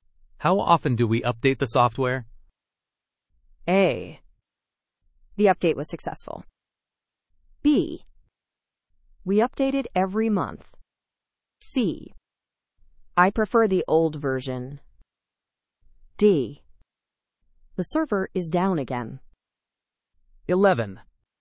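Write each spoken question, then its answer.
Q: How often do we update the software?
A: B: We update it every month.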